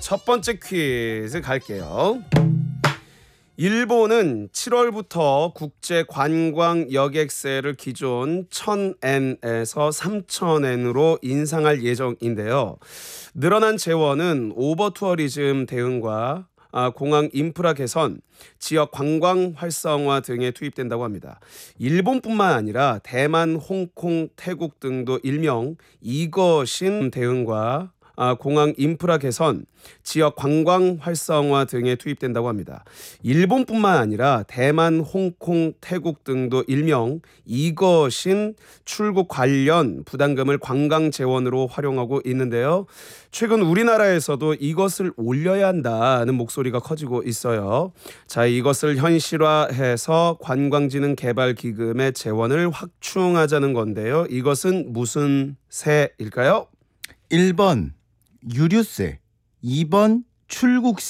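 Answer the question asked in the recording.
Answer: 2번: 출국세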